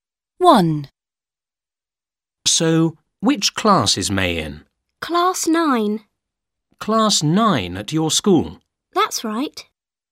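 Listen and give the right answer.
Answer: Class 9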